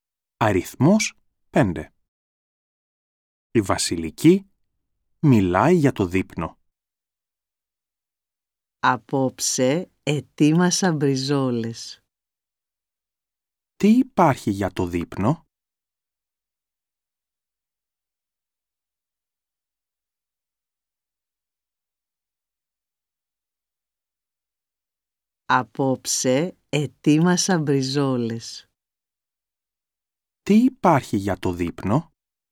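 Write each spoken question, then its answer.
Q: Τι υπάρχει για το δείπνο?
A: Μπριζόλες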